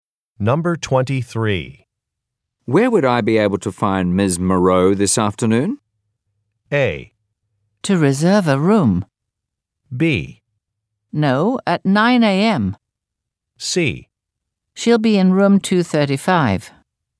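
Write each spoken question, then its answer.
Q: Where would I be able to find Ms. Moreau this afternoon?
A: C: She'll be in room 235.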